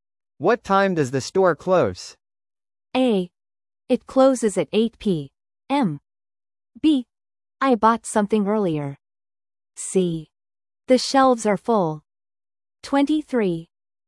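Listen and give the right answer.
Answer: A: It closes at 8 p.m.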